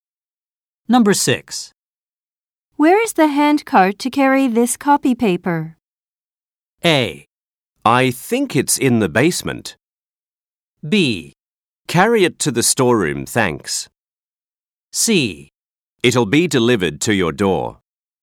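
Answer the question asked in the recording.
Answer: A: I think it's in the basement.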